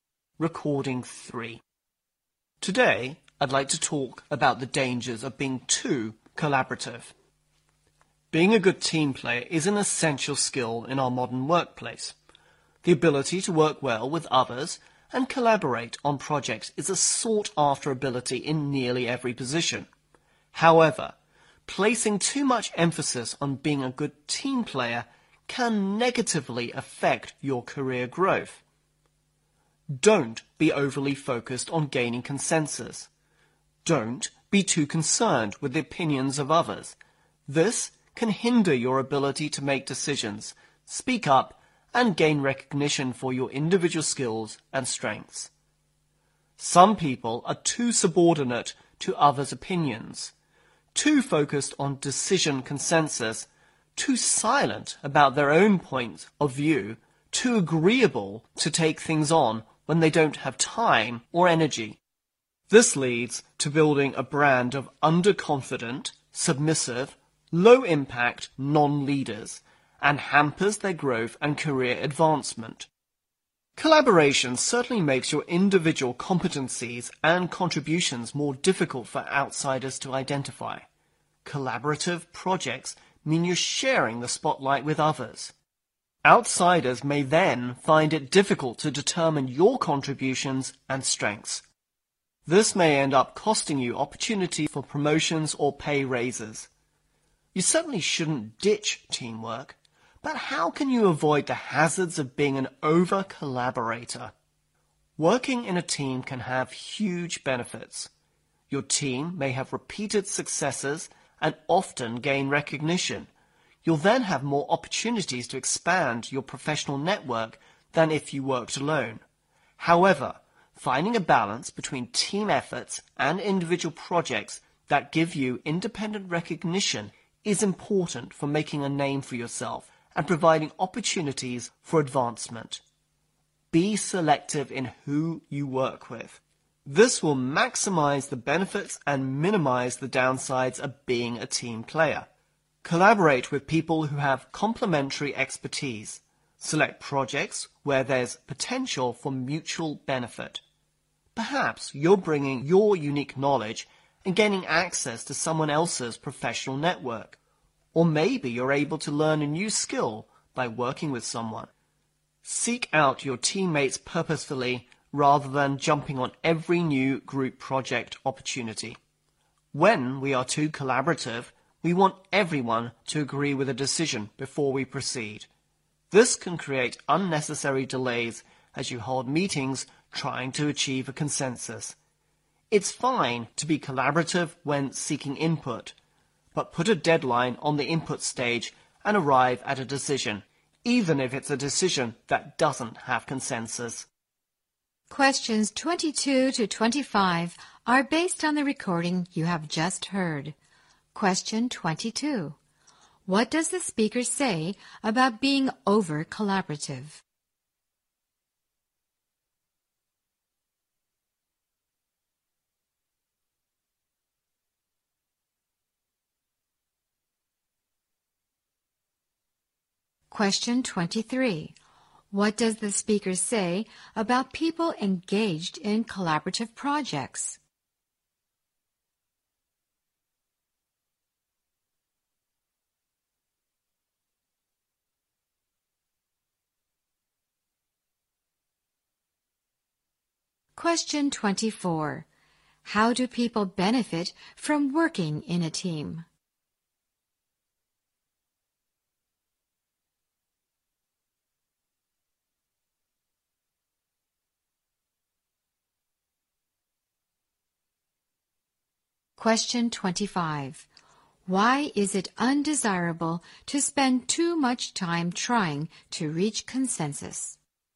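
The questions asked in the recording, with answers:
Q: What does the speaker say about being over-collaborative?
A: It can negatively affect your career growth

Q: What does the speaker say about people engaged in collaborative projects?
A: Their individual contributions are hard for outsiders to identify

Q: How do people benefit from working in a team?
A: More opportunities to expand their professional network

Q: Why is it undesirable to spend too much time trying to reach consensus?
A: It creates unnecessary delays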